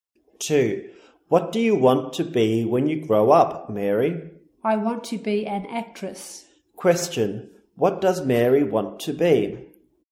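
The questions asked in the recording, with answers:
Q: What does Mary want to be?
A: An actress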